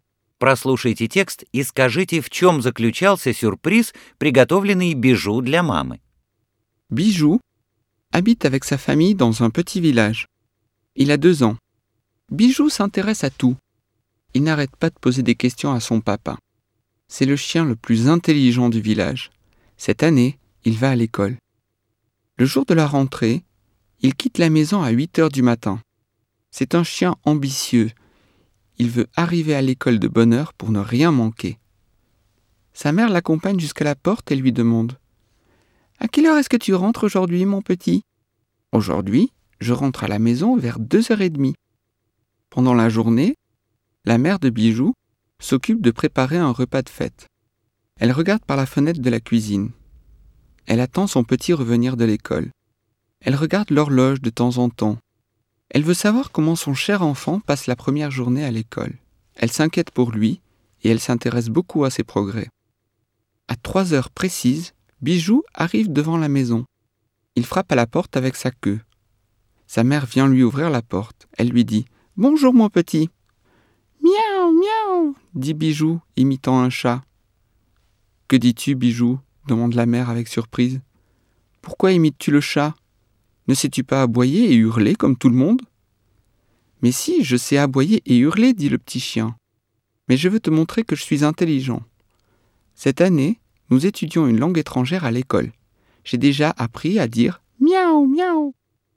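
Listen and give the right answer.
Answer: Он заговорил «мяу-мяу», как кошка, — показал, что выучил иностранный язык в школе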